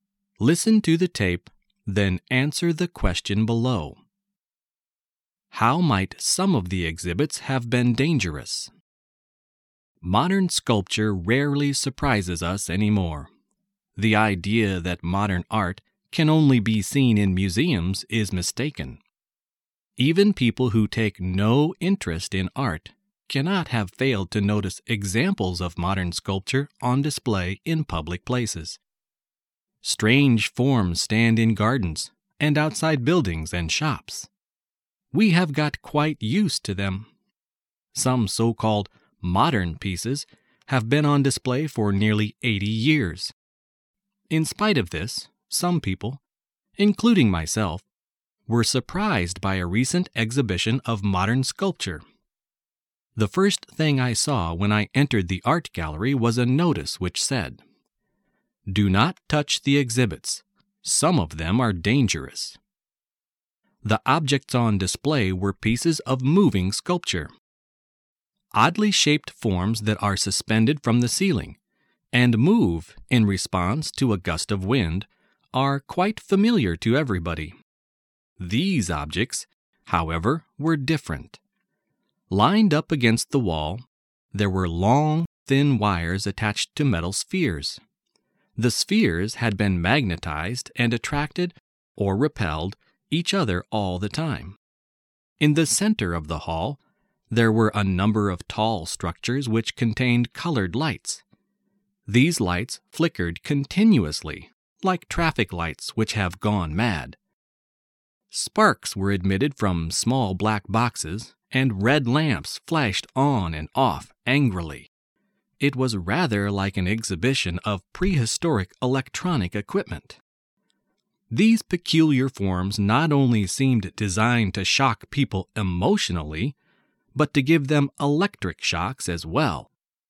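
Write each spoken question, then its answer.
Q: How might some of the exhibits have been dangerous?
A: They could give people electric shocks.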